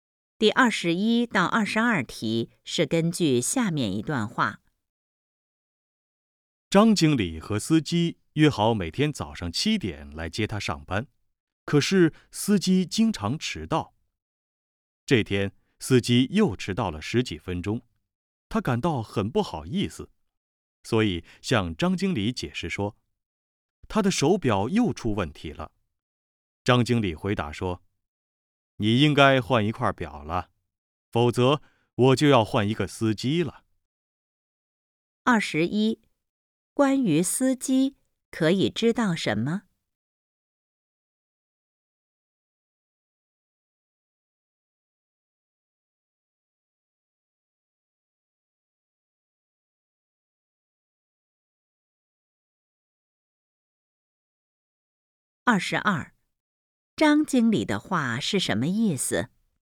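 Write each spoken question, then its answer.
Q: 关于司机,可以知道什么?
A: 经常迟到

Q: 张经理的话是什么意思?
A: 再迟到就换司机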